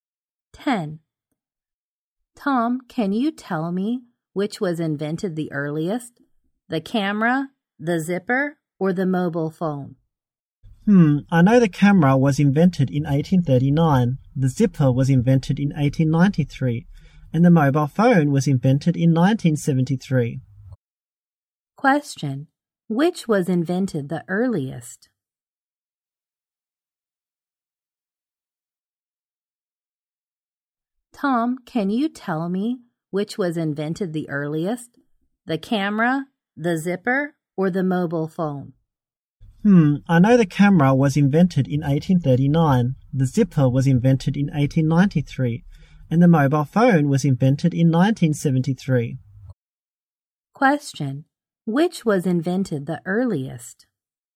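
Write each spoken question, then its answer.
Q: Which was invented the earliest?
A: The camera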